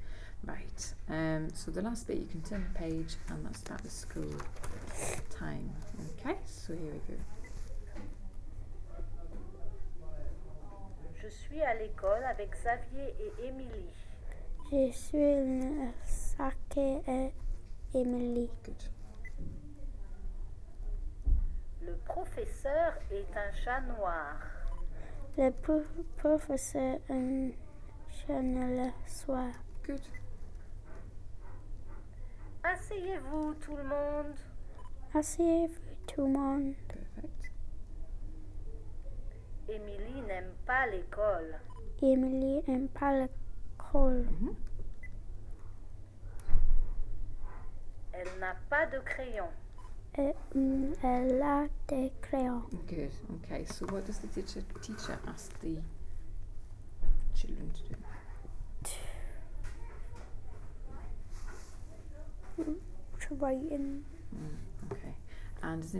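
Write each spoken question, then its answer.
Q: So what does the teacher ask the children to do?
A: Sit down

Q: And does Emily like school?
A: No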